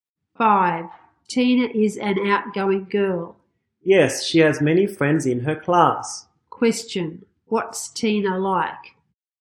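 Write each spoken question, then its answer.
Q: What's Tina like?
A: Outgoing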